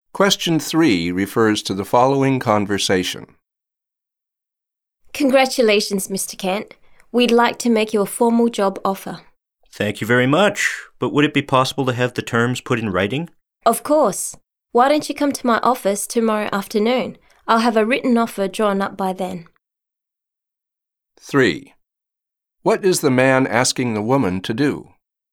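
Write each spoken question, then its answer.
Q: What is the man asking the woman to do?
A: Put the job offer terms in writing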